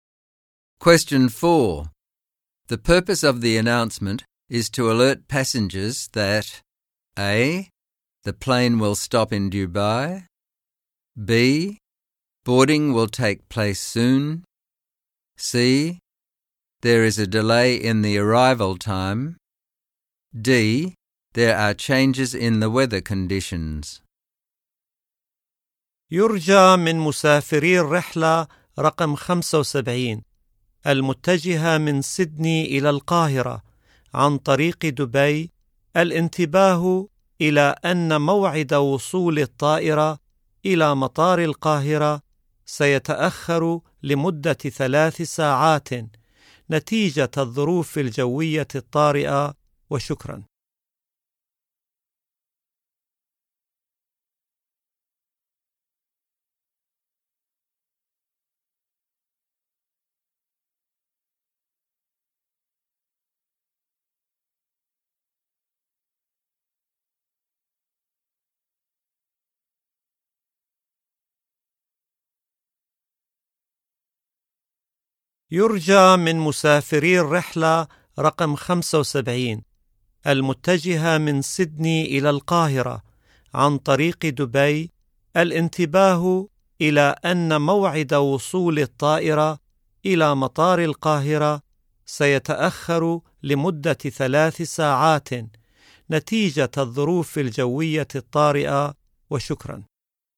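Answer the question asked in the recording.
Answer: C: There is a delay in the arrival time.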